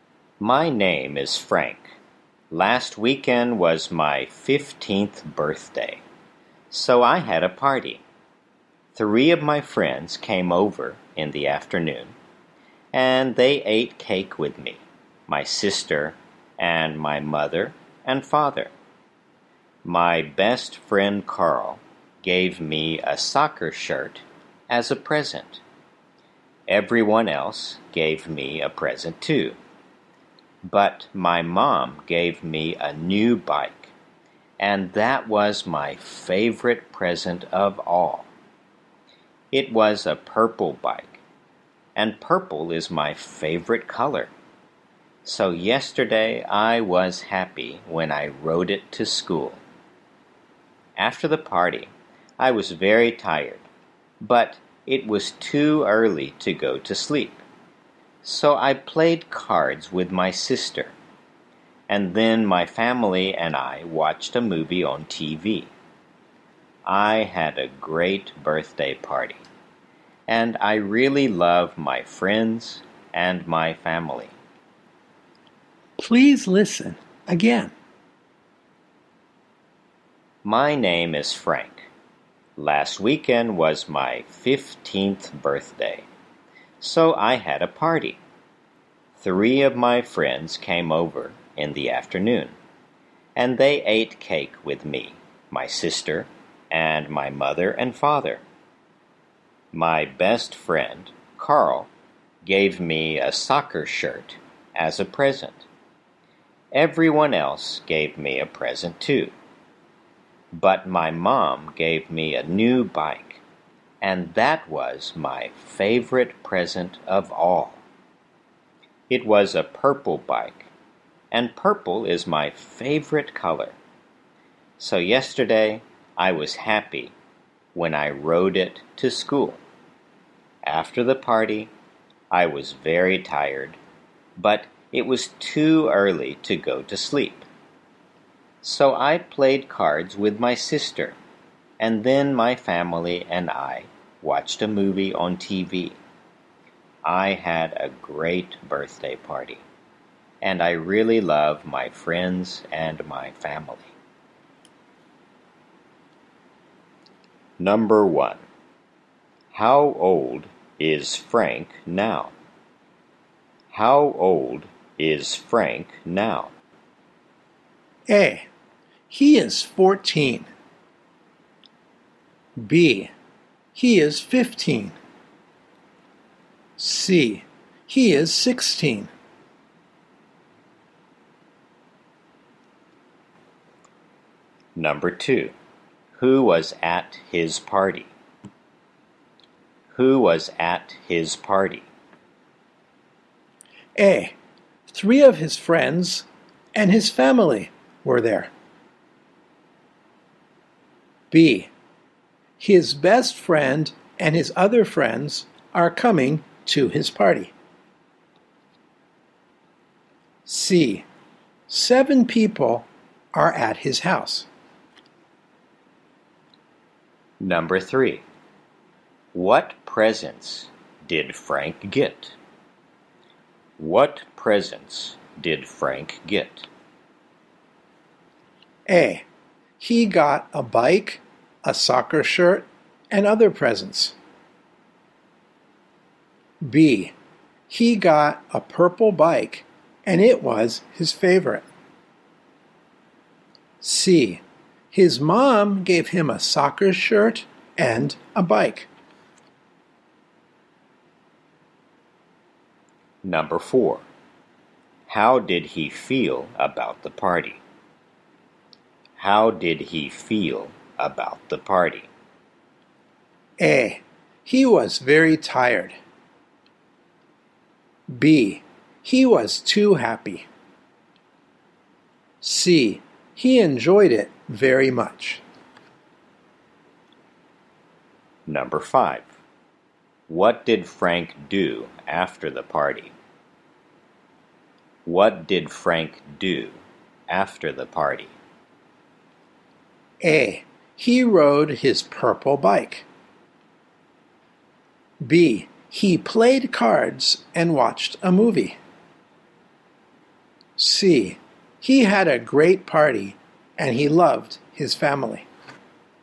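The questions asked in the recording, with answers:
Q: How old is Frank now?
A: B: He is 15.

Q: Who was at his party?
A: A: 3 of his friends and his family were there.

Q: What presents did Frank get?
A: A: He got a bike, a soccer shirt, and other presents.

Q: How did he feel about the party?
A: C: He enjoyed it very much.

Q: What did Frank do after the party?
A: B: He played cards and watched a movie.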